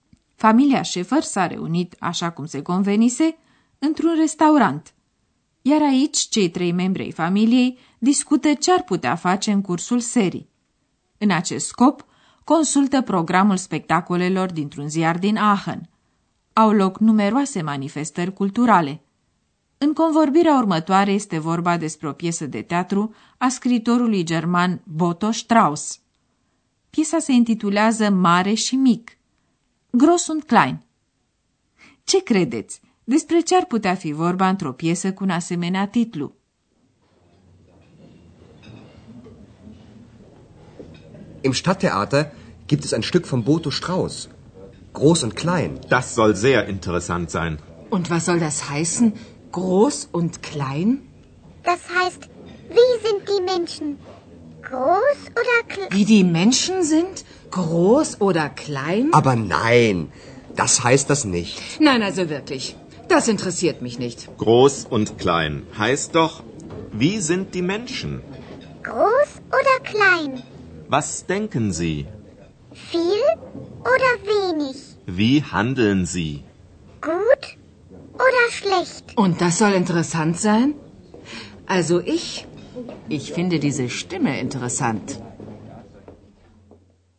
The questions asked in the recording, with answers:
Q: Despre ce ar putea fi vorba într-o piesă cu un asemenea titlu?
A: Mare și mic nu se referă la statura oamenilor, ci la caracterul lor, la felul cum gândesc și acționează.